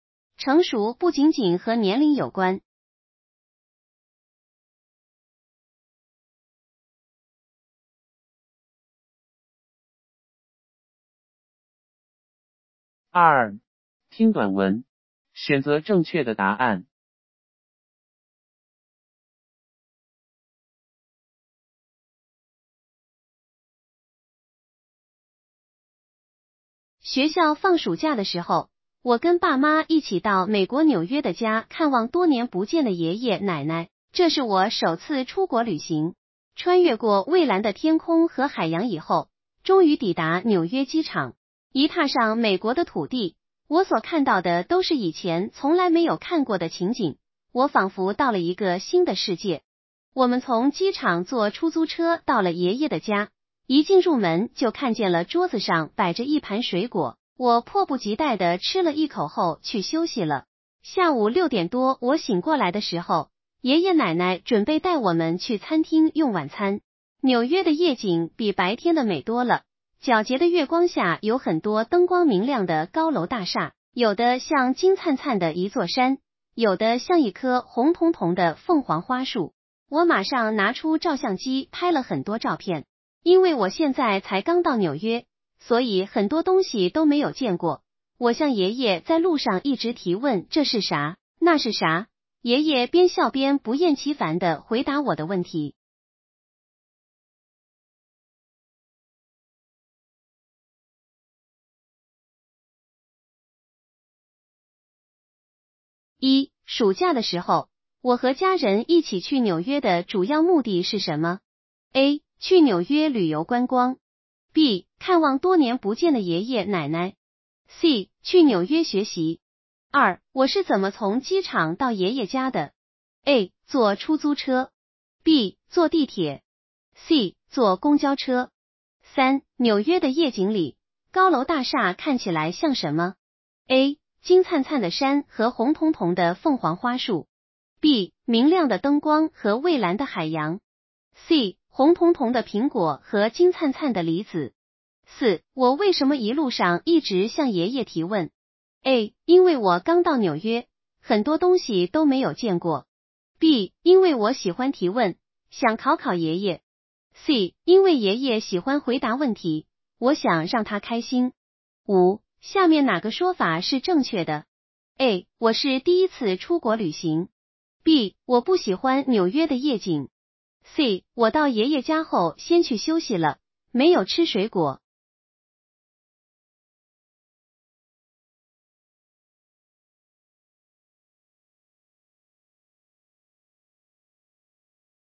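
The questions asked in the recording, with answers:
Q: 暑假的时候,我和家人一起去纽约的主要目的是什么?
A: B: 看望多年不见的爷爷奶奶。

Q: 我是怎么从机场到爷爷家的?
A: A: 坐出租车。

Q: 纽约的夜景里,高楼大厦看起来像什么?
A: A: 金灿灿的山和红彤彤的凤凰花树。

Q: 我为什么一路上一直向爷爷提问?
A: A: 因为我刚到纽约,很多东西都没有见过。

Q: 下面哪个说法是正确的?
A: A: 我是第一次出国旅行。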